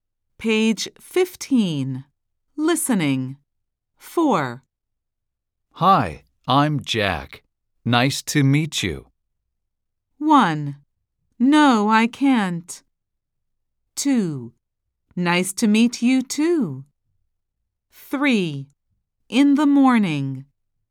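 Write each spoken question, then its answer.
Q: Hi, I'm Jack. Nice to meet you.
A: 2: Nice to meet you, too.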